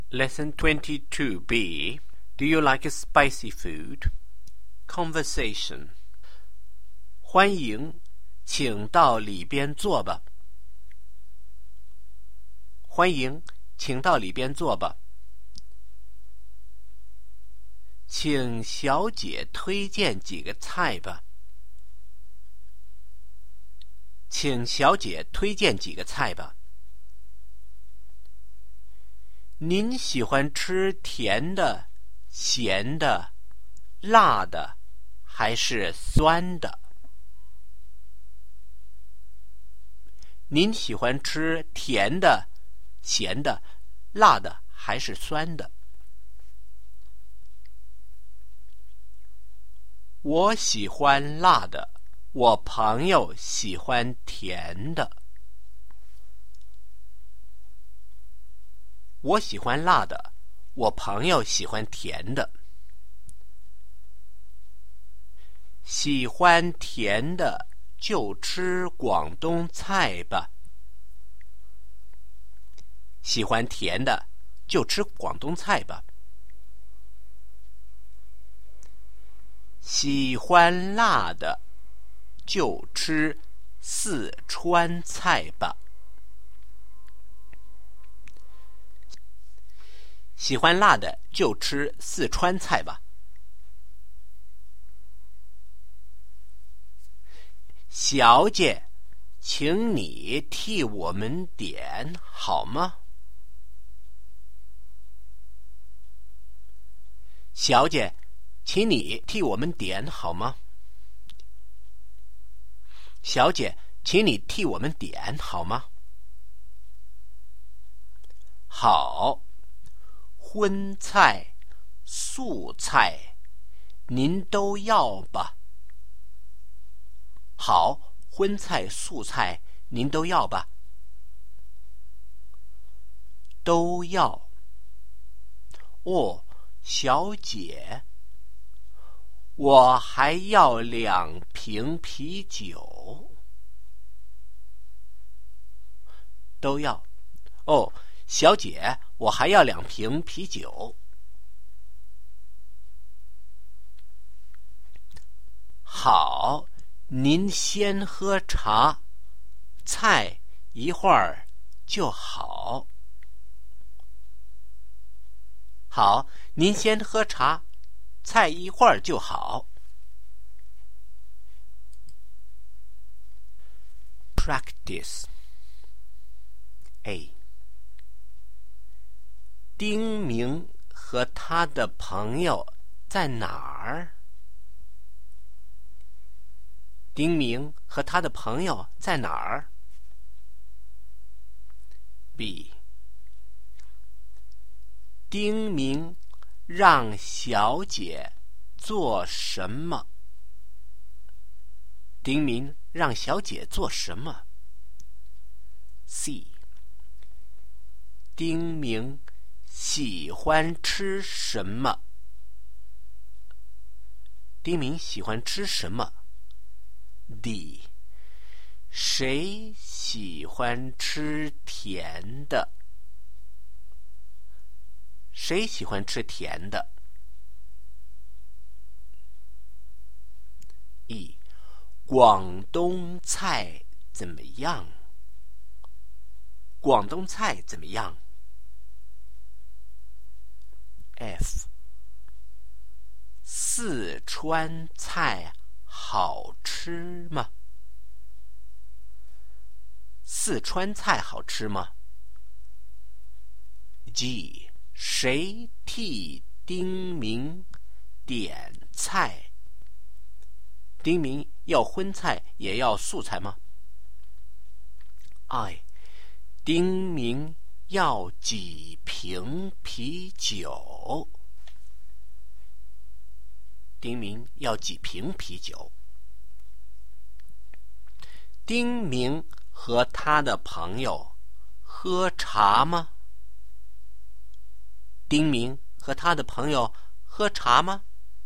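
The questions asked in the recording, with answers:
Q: 丁明和他的朋友在哪儿?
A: 在饭馆

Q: 丁明让小姐做什么?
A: 推荐几个菜,替他们点菜

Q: 丁明喜欢吃什么?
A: 辣的

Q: 谁喜欢吃甜的?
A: 丁明的朋友

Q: 广东菜怎么样?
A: 是甜的

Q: 谁替丁明点菜?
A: 小姐

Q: 丁明要荤菜也要素菜吗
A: 都要

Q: 丁明要几瓶啤酒?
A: 两瓶

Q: 丁明和他的朋友喝茶吗?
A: 喝,先喝茶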